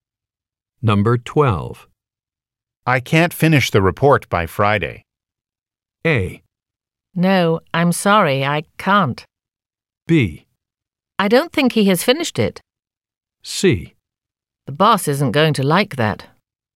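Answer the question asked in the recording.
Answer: C: The boss isn't going to like that.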